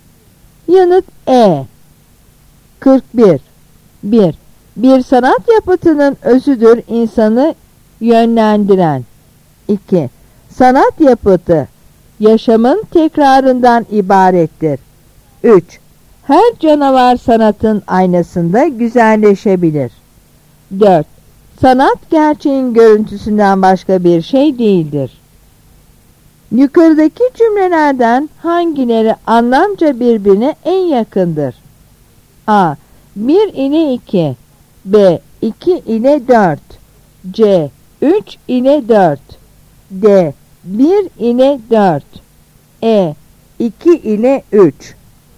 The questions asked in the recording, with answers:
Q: Yukarıdaki cümlelerden hangileri anlamca birbirine en yakındır?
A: Yanıt B.